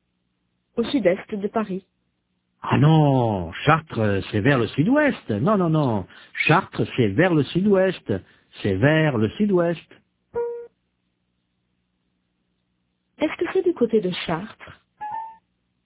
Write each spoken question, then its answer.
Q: Est-ce que c'est du côté de Chartres?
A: Non, Chartres, c'est vers le sud-ouest.